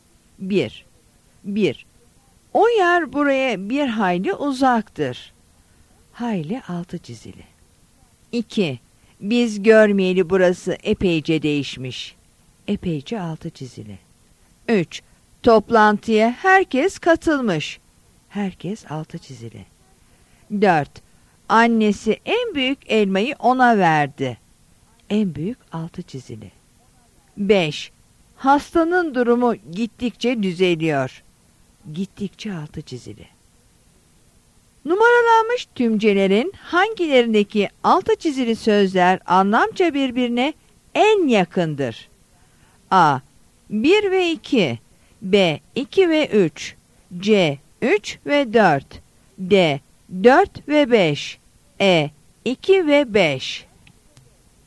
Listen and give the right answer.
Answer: Yanıt A'dır.